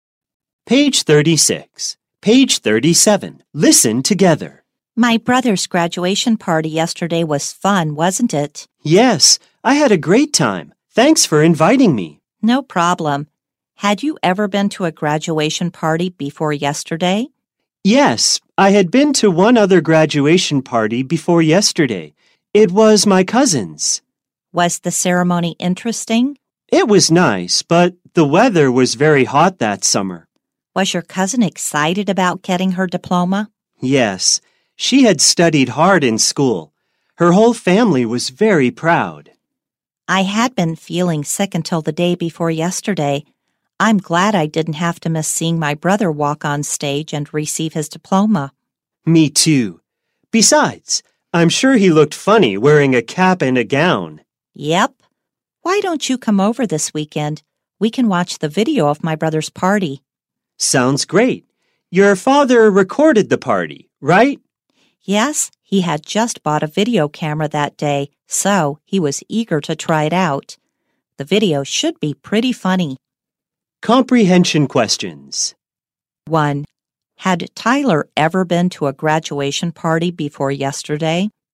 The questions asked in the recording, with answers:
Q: Had Tyler ever been to a graduation party before yesterday?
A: Yes, he had been to a graduation party before yesterday.